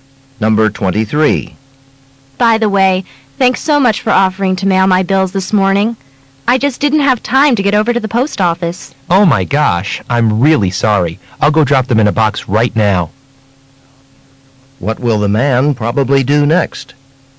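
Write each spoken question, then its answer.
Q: What will the man probably do next?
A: Mail the bills right away.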